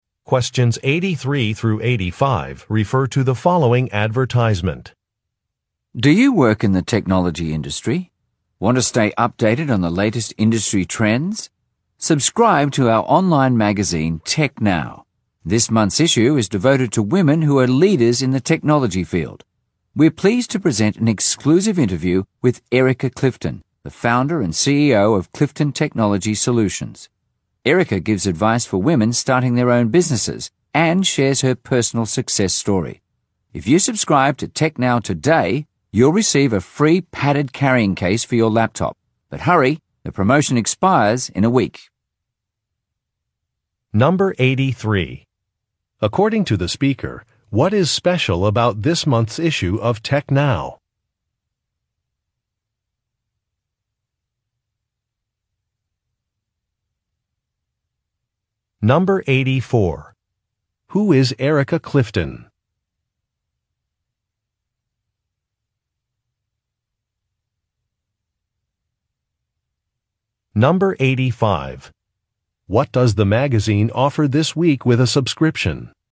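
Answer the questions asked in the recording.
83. It's devoted to women who are leaders in the technology field
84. The founder and CEO of Clifton Technology Solutions
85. A free padded laptop carrying case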